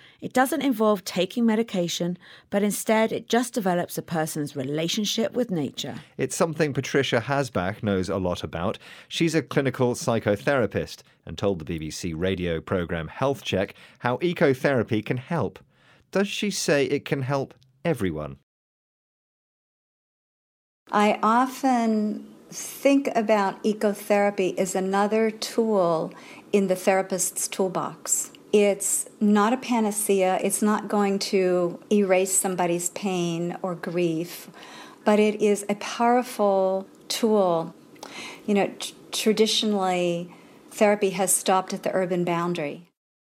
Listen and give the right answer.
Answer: Ah, but she says it's not a panacea, so not something that will solve everything.